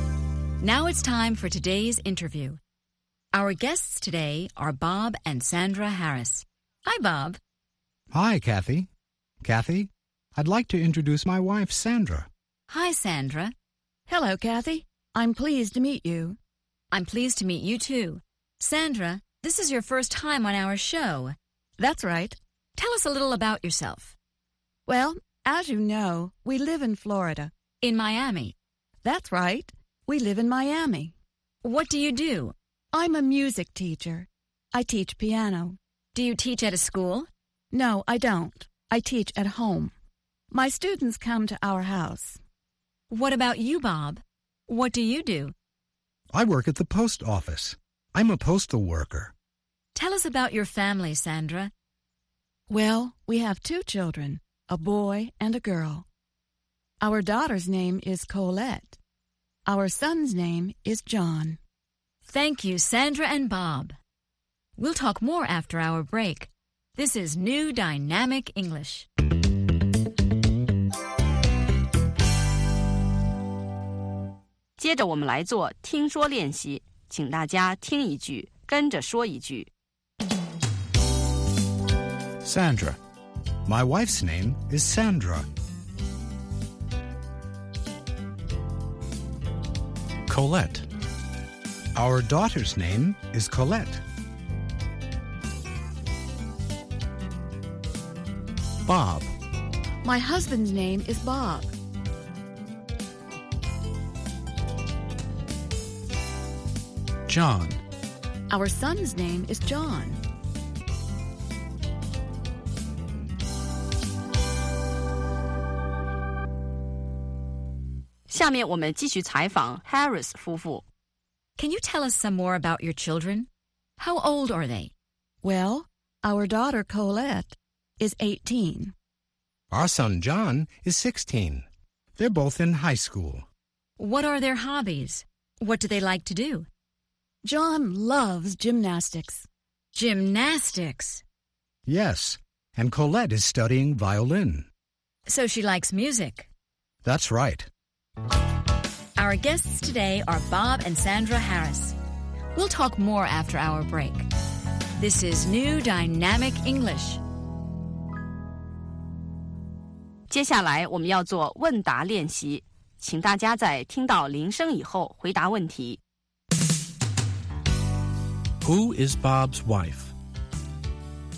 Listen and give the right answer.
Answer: Sandra is Bob's wife.